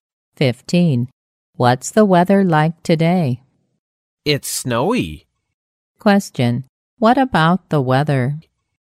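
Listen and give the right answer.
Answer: It's snowy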